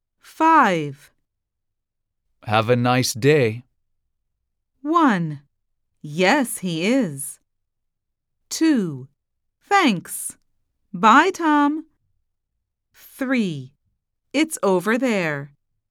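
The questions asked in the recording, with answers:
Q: Have a nice day.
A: 2: Thanks.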